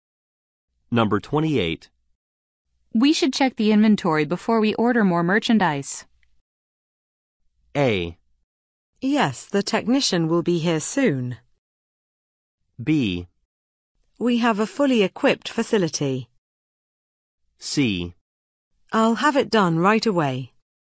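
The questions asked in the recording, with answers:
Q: We should check the inventory before we order more merchandise.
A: C: I'll have it done right away.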